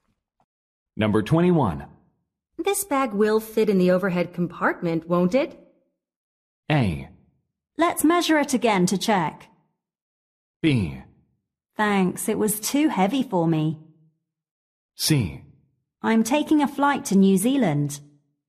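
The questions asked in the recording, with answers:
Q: This bag will fit in the overhead compartment, won't it?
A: A: Let's measure it again to check.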